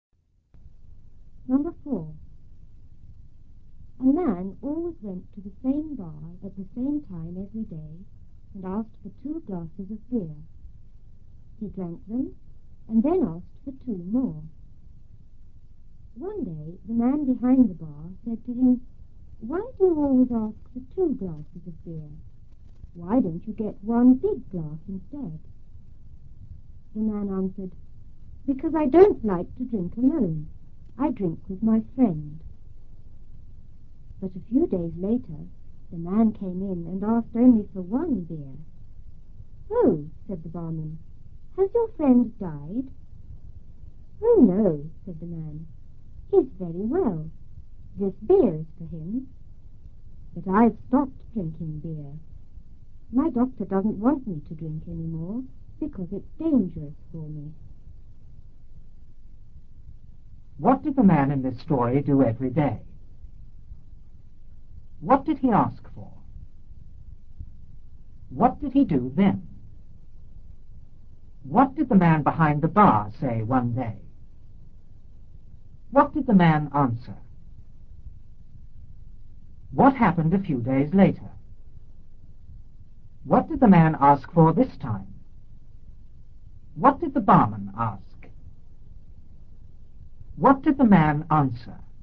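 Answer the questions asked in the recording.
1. He went to the same bar at the same time
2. Two glasses of beer
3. He drank them and asked for two more
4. Why do you always ask for two glasses of beer? Why don't you get one big glass instead?
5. Because he didn't like to drink alone; he drank with his friend
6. The man came in and asked for only one beer
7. Only one beer
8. Has your friend died?
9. No, his friend is very well; the beer is for him, but he has stopped drinking because his doctor says it's dangerous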